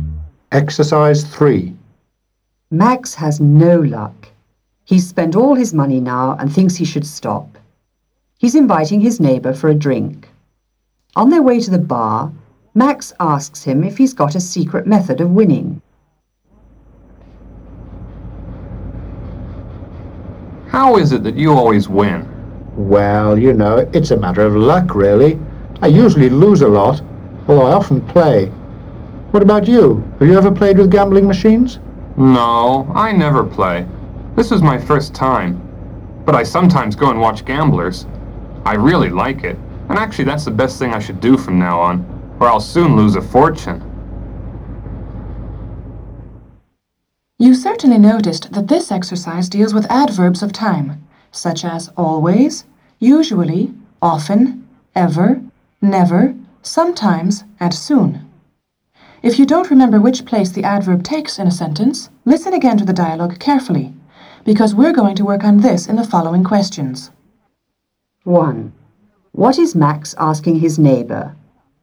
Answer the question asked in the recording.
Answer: He's asking him how it is that he always wins.